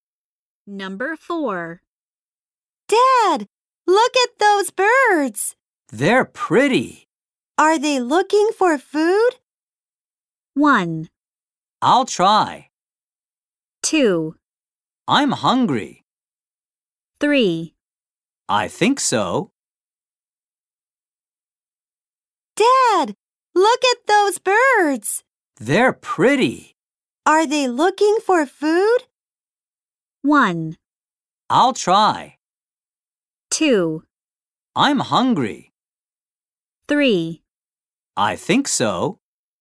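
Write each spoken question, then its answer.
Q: Are they looking for food?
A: 3: I think so.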